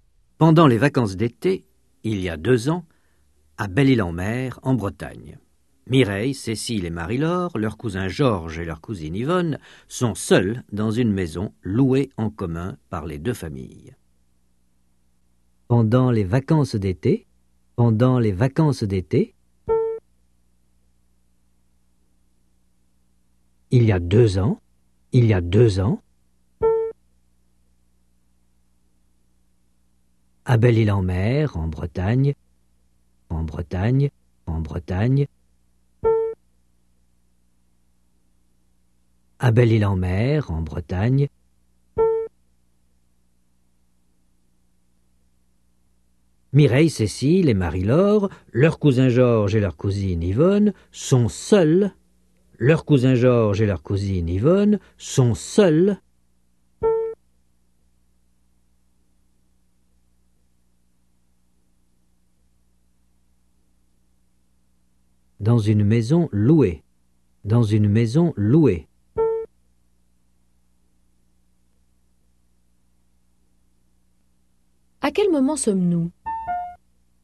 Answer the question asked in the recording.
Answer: Pendant les vacances d'été, il y a 2 ans.